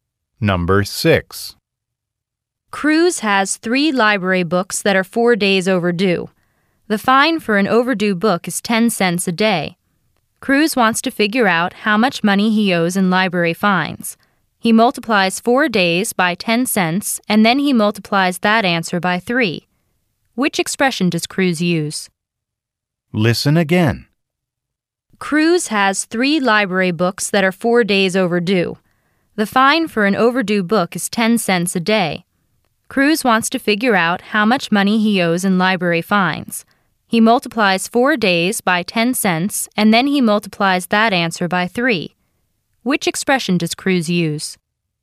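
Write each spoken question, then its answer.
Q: Which expression does Cruz use?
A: (4 × 10) × 3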